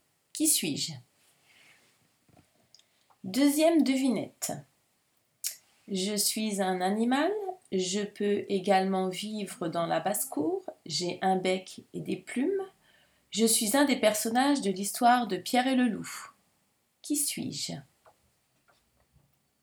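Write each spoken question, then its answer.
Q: Qui suis-je?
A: le canard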